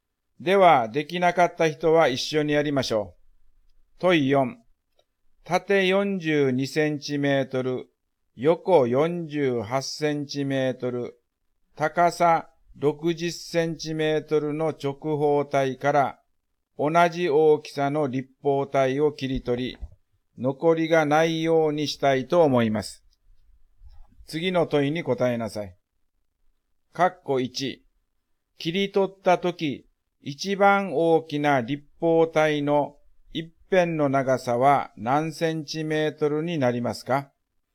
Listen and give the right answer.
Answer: 42、48、60の最大公約数は6ですね